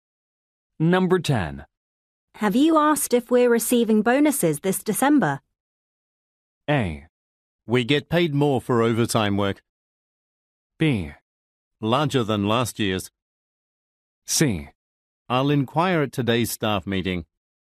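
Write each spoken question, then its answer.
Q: Have you asked if we're receiving bonuses this December?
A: C: I'll inquire at today's staff meeting.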